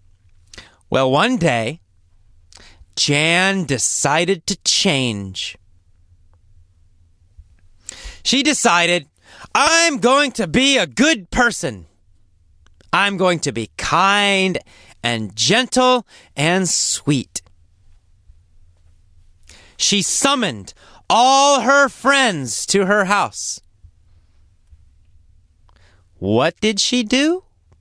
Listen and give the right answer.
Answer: She summoned her friends to her house.